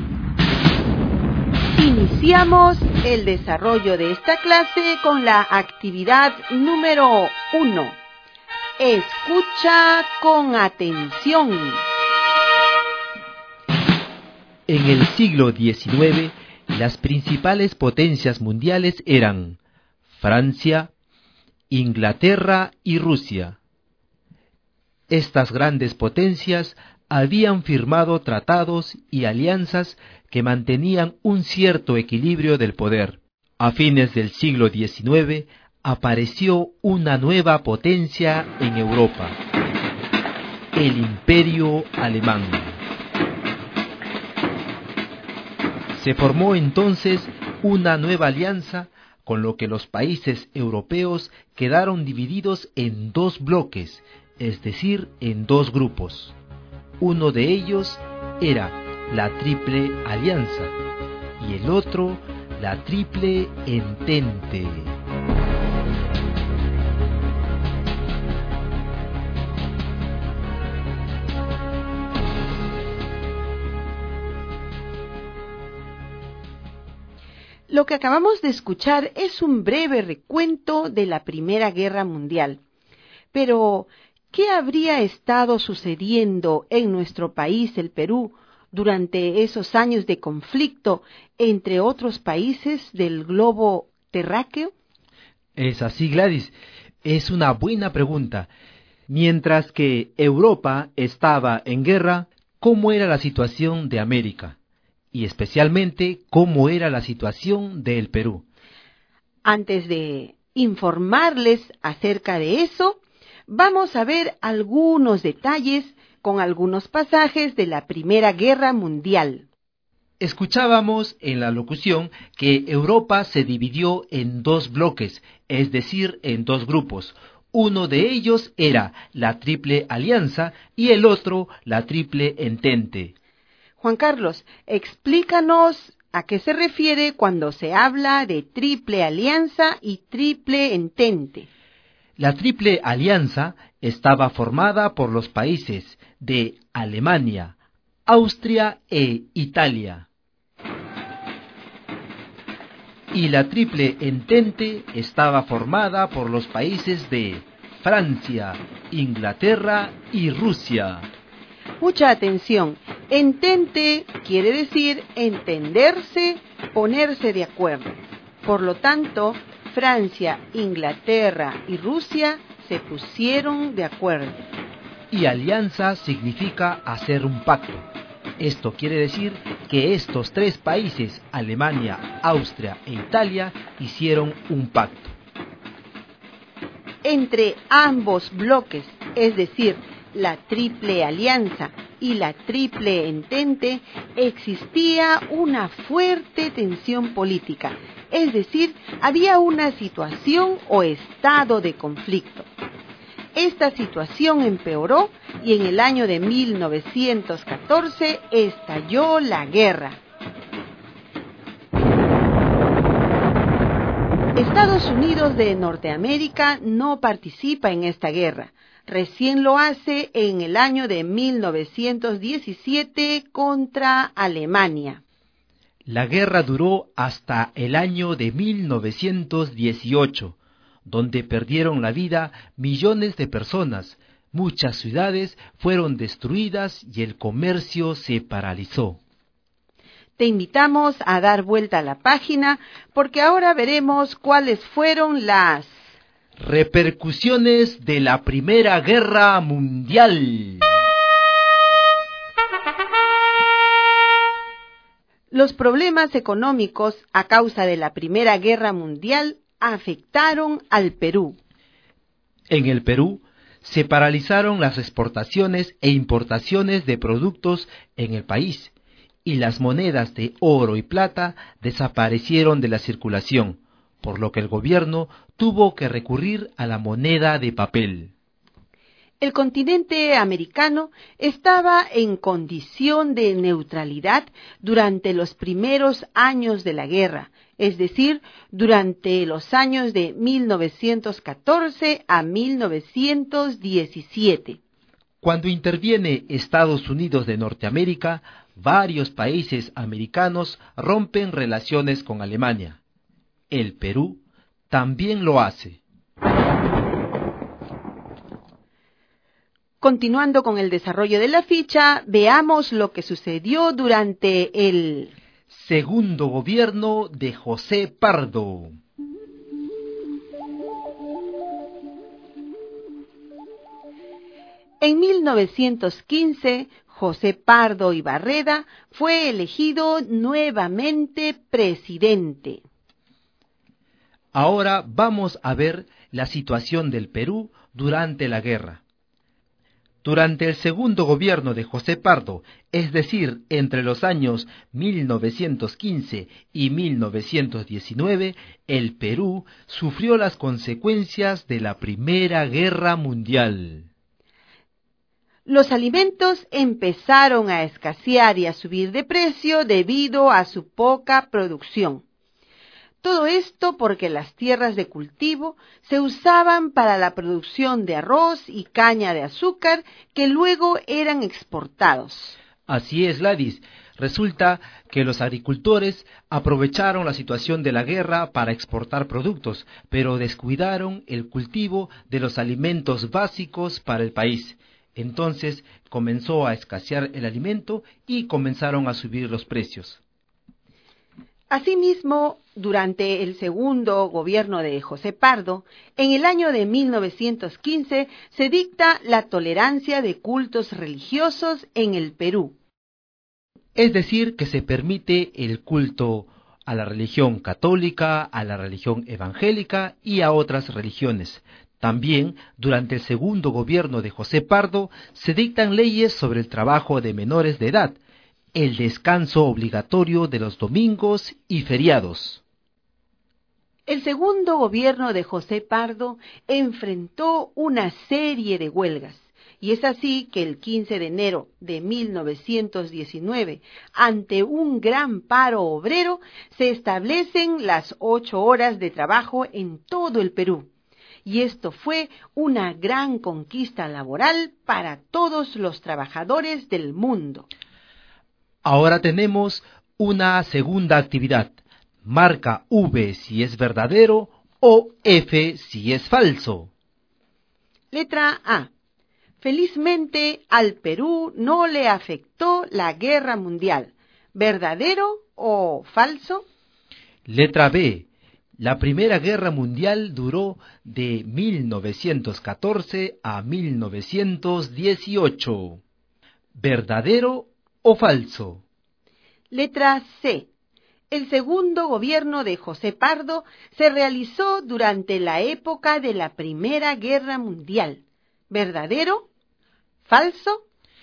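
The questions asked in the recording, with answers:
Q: Letra A. Felizmente al Perú no le afectó la guerra mundial.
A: Falso

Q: Letra B. La Primera Guerra Mundial duró de 1914 a 1918.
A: Verdadero

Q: Letra C. El segundo gobierno de José Pardo se realizó durante la época de la Primera Guerra Mundial.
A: Verdadero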